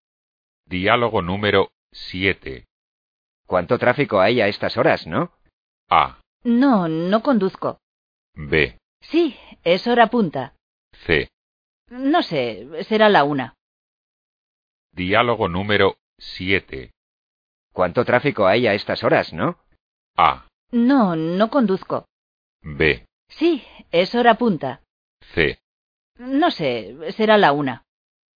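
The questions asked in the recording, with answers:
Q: ¿Cuánto tráfico hay a estas horas, no?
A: B: Sí, es hora punta.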